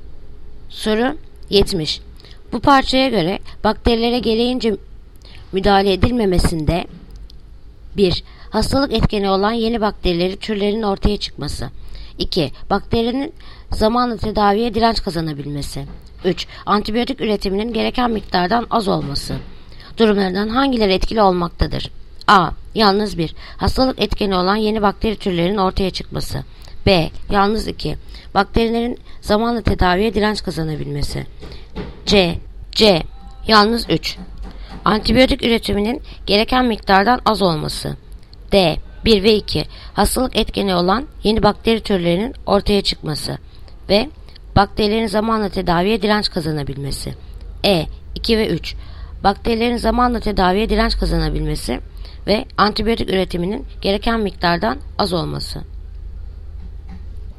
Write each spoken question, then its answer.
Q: Bu parçaya göre bakterilere gereğince müdahale edilmemesinde 1.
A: Yanıt Diyarbakır. 1 ve 2.